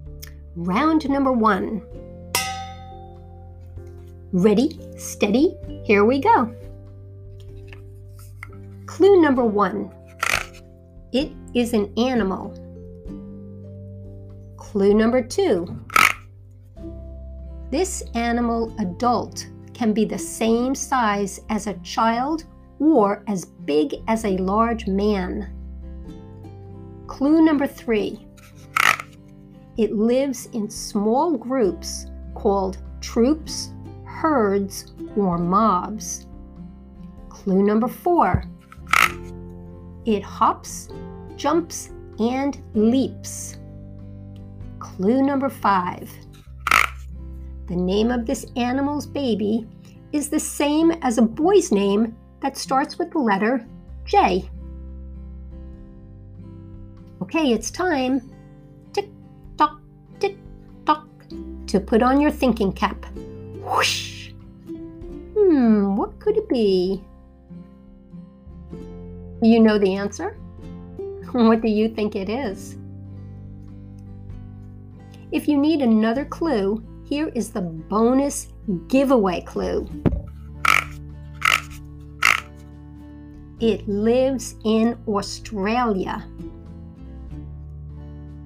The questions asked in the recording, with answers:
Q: What could it be?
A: Did you say kangaroo?